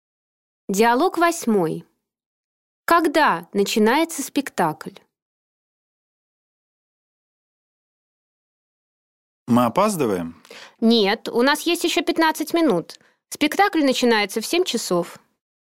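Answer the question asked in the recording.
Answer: В 7 часов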